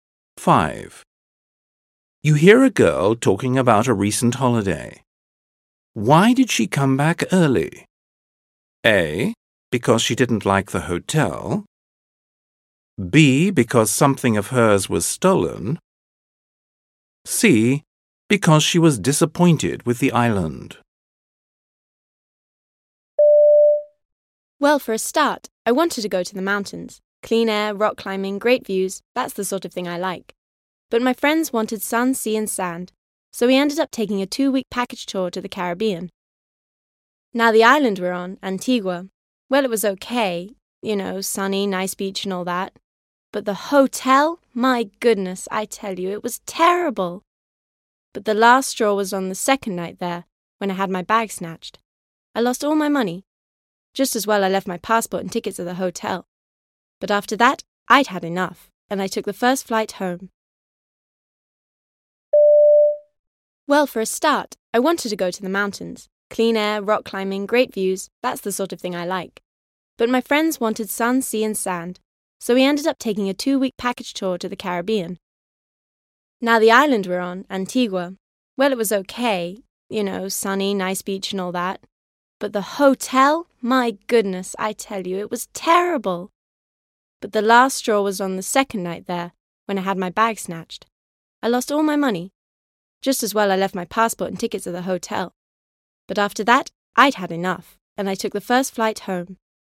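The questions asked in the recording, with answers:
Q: Why did she come back early?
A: B: Because something of hers was stolen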